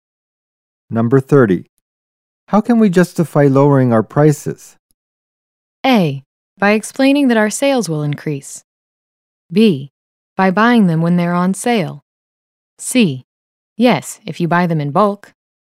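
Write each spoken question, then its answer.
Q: How can we justify lowering our prices?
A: A: By explaining that our sales will increase.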